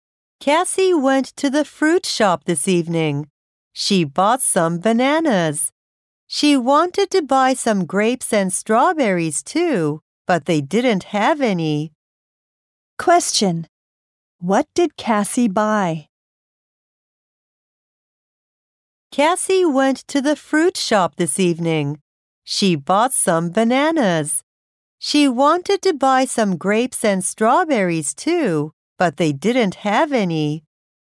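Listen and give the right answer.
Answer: Some bananas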